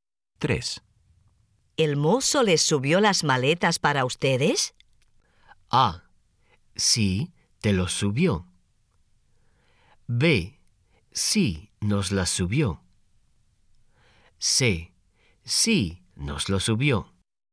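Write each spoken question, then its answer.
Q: ¿El mozo les subió las maletas para ustedes?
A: B: Sí, nos las subió.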